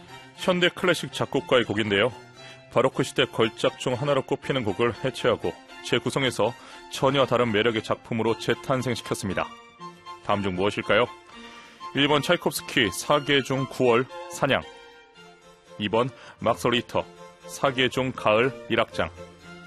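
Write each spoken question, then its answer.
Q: 다음 중 무엇일까요? 1번 차이콥스키 사계 중 9월 사냥, 2번 막스 리히터 사계 중 가을 1악장.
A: 2: 막스 리히터 사계 중 가을 1악장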